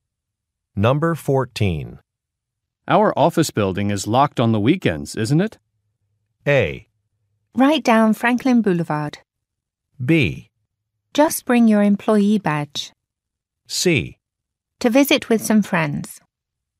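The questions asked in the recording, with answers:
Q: Our office building is locked on the weekends, isn't it?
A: B: Just bring your employee badge.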